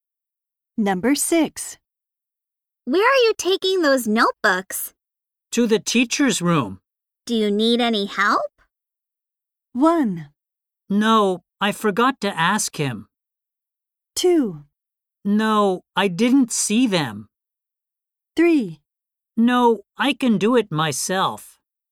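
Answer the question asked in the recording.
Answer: 3: No, I can do it myself.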